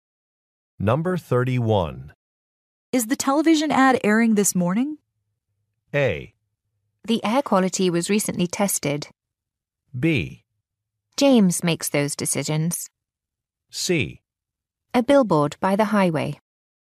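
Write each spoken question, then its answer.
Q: Is the television ad airing this morning?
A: B: James makes those decisions.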